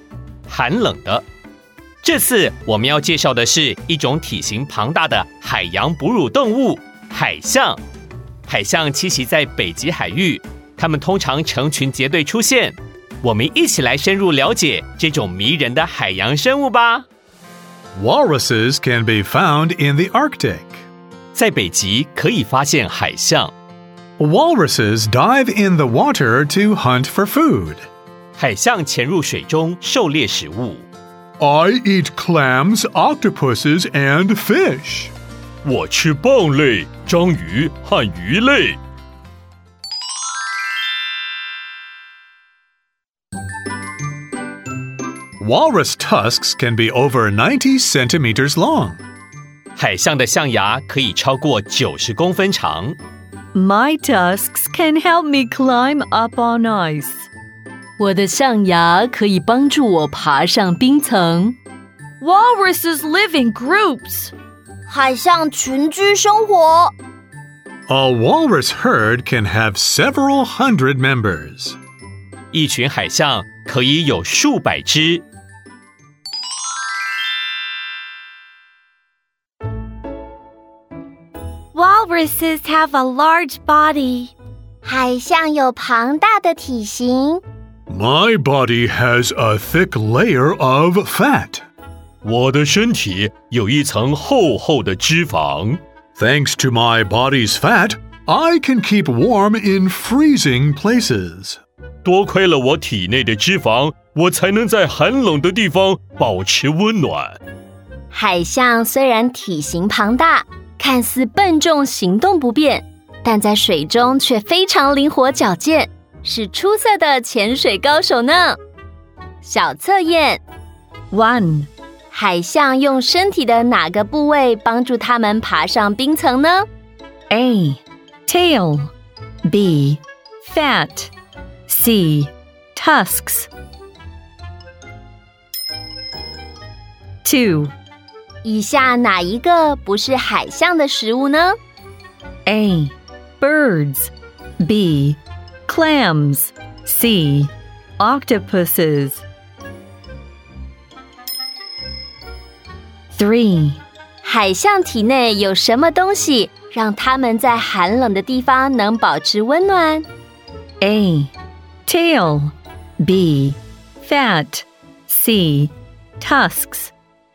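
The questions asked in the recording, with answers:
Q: 海象用身体的哪个部位帮助它们爬上冰层呢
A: C: Tusks

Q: 以下哪一个不是海象的食物呢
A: A: Birds

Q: 海象体内有什么东西让它们在寒冷的地方能保持温暖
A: B: Fat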